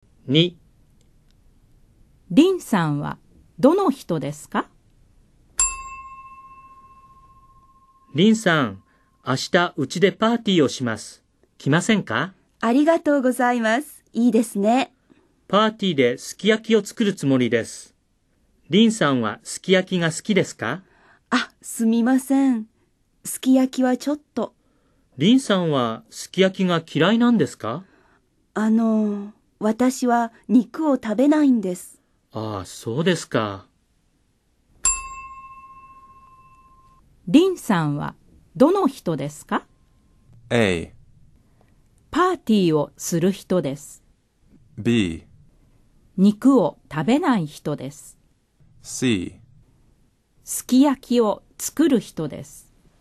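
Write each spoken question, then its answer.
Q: 林さんはどの人ですか?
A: B: 肉を食べない人です。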